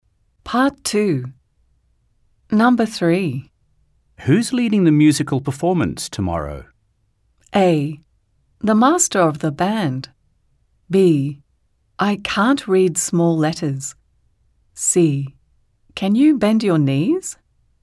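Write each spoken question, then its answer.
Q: Who's leading the musical performance tomorrow?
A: A: The master of the band.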